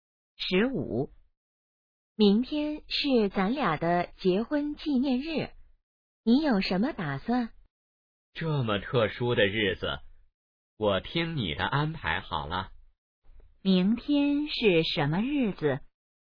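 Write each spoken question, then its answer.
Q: 明天是什么日子?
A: 结婚纪念日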